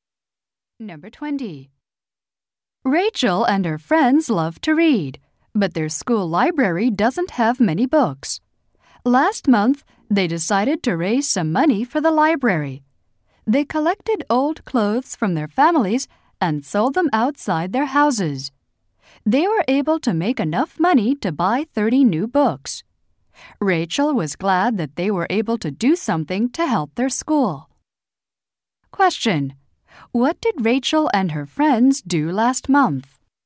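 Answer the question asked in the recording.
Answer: Sold old clothes to raise money for the school library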